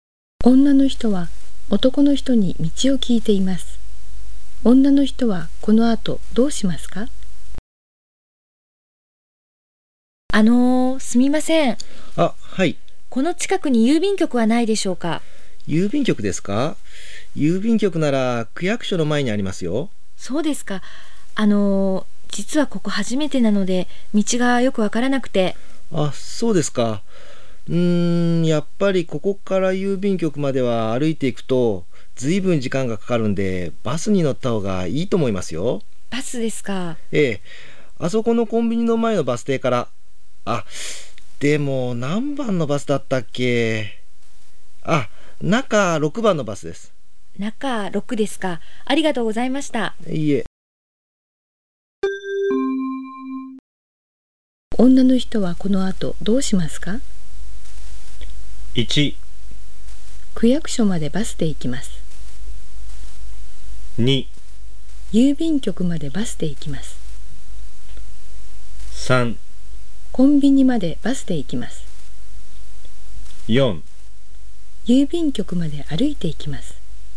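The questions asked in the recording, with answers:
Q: 女の人はこの後どうしますか?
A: 2: 郵便局までバスで行きます。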